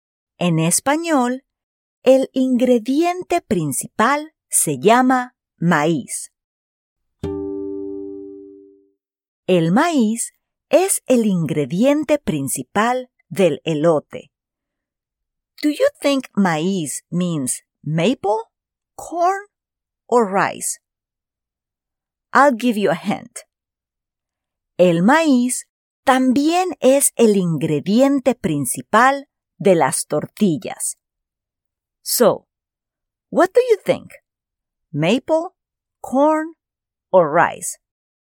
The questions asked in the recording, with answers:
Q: Do you think maíz means maple, corn, or rice?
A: If you said corn, you are correct.